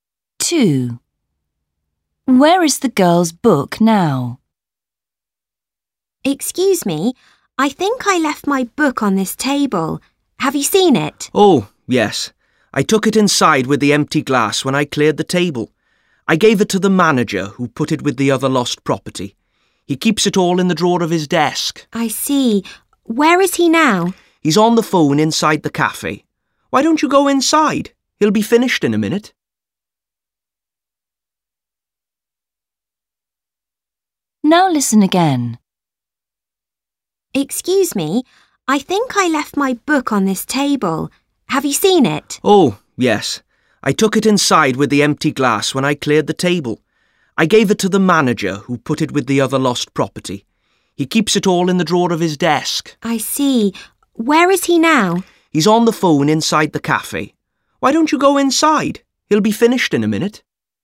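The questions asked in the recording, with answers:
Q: Where is the girl's book now?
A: In the drawer of the manager's desk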